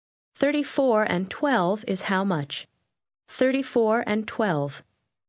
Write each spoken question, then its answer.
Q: 34 and 12 is how much? 34 and 12.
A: 46.